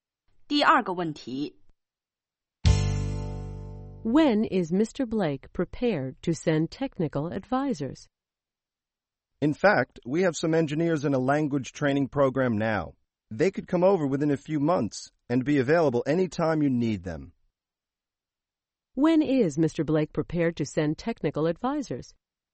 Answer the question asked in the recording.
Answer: The engineers are in a language training program now, and they'll be available within a few months.